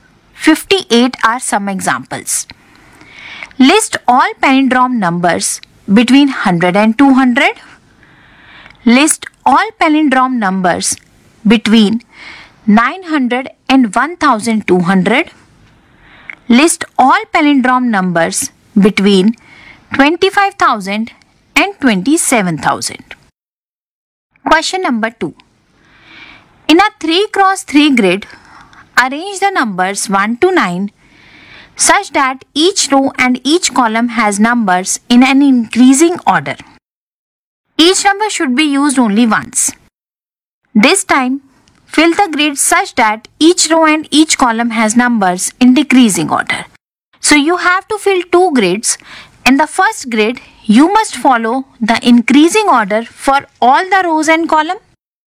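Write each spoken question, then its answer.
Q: List all palindrome numbers between 100 and 200.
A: 101, 111, 121, 131, 141, 151, 161, 171, 181, 191

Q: List all palindrome numbers between 900 and 1200.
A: 909, 919, 929, 939, 949, 959, 969, 979, 989, 999, 1001, 1111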